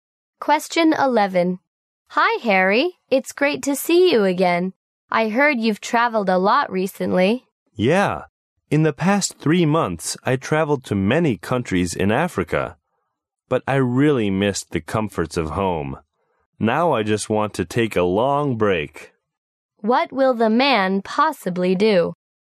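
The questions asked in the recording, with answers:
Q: What will the man possibly do?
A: Stay at home and take a long rest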